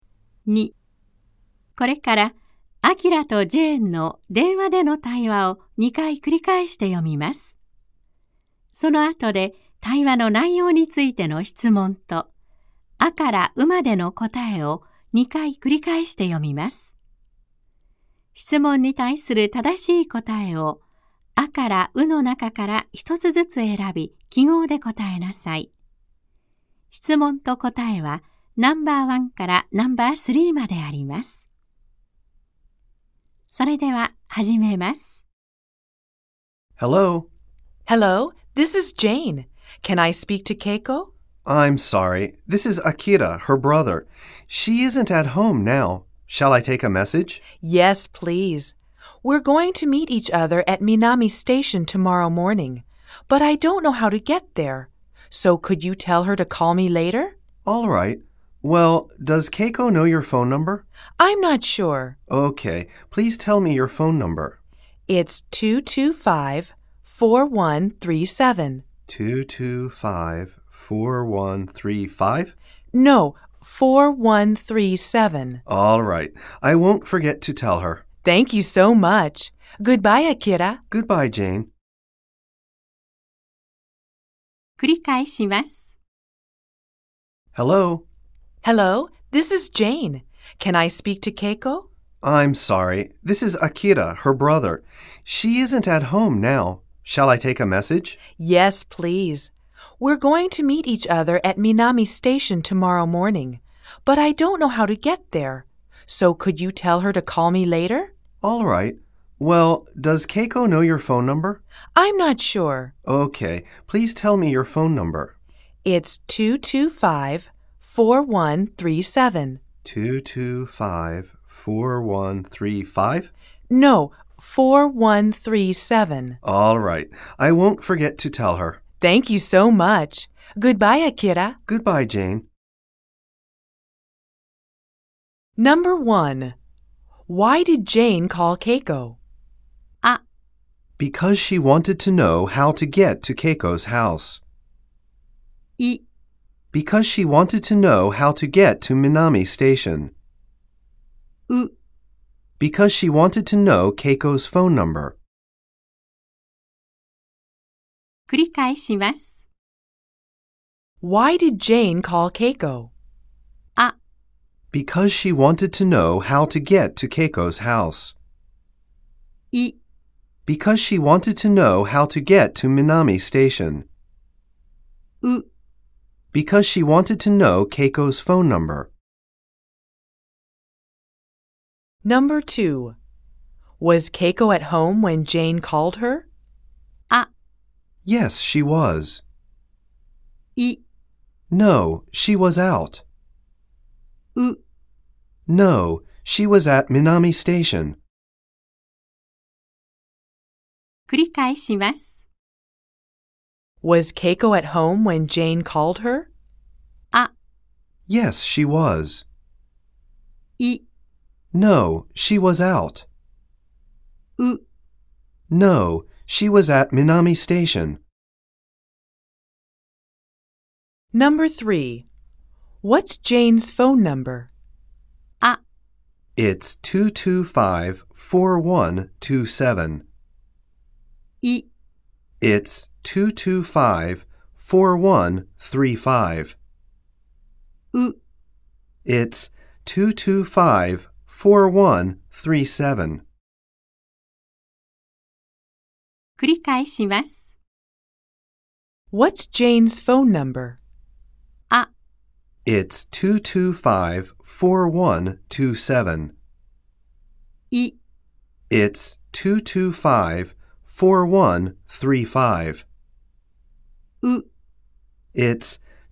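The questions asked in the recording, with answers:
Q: Why did Jane call Keiko?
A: イ: Because she wanted to know how to get to Minami Station.

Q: Was Keiko at home when Jane called her?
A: イ: No, she was out.

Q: What's Jane's phone number?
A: ウ: It's 225-4137.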